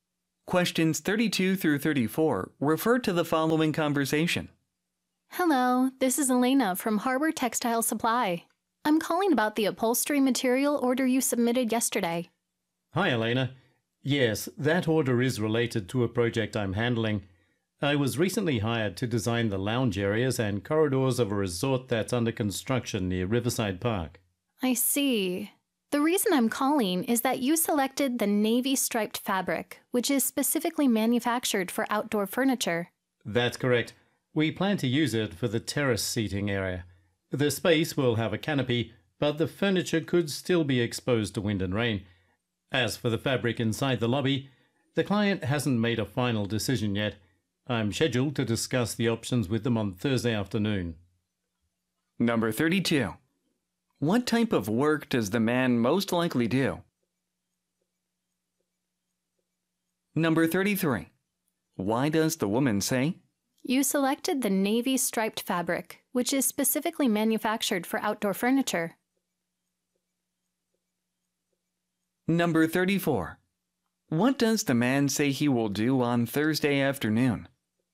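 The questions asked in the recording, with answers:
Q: What type of work does the man most likely do?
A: 32번 정답은 보기 중에는 B번 인테리어 디자인 분야에 일하는 게 맞다.

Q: What does the man say he will do on Thursday afternoon?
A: Discuss the lobby fabric options with the client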